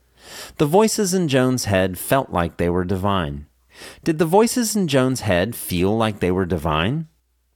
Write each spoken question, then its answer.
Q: Did the voices in Joan's head feel like they were divine?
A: Yes, the voices in Joan's head felt like they were divine.